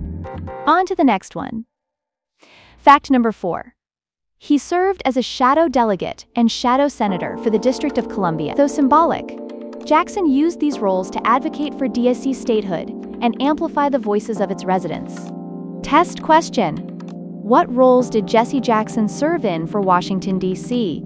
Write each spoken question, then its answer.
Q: What roles did Jesse Jackson serve in for Washington, D.C.?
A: Correct answer. Shadow delegate and shadow senator.